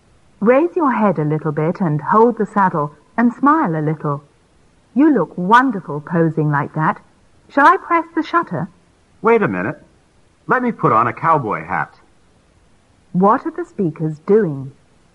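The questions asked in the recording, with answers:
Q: What are the speakers doing?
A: Taking a photo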